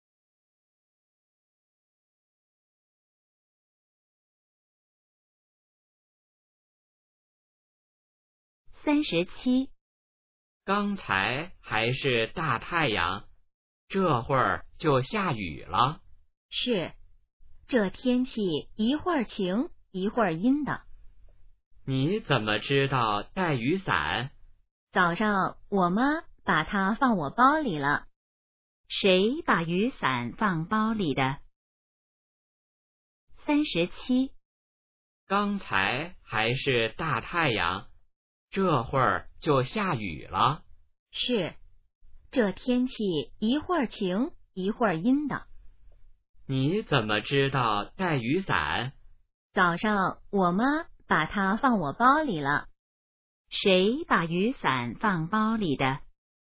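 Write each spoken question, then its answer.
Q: 谁把雨伞放包里的?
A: 妈妈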